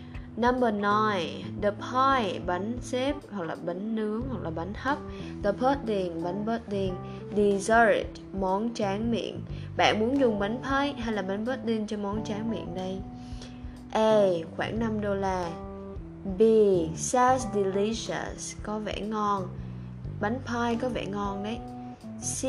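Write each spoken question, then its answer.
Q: Bạn muốn dùng bánh pie hay là bánh pudding cho món tráng miệng đây?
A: B: Sounds delicious, có vẻ ngon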